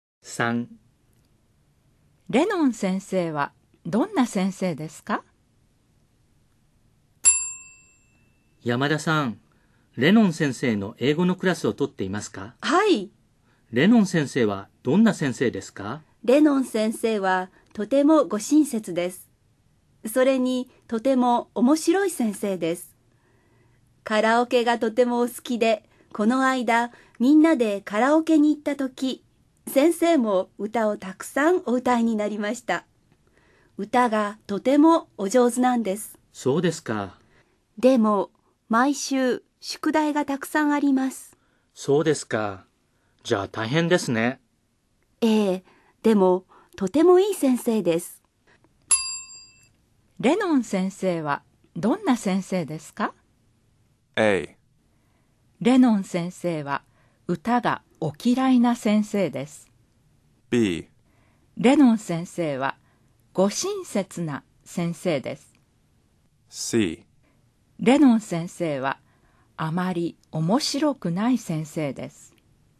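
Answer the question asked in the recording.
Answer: B: レノン先生はご親切な先生です。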